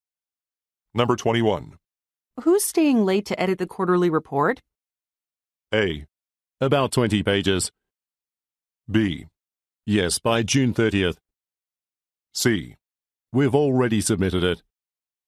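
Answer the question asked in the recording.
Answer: C: We've already submitted it.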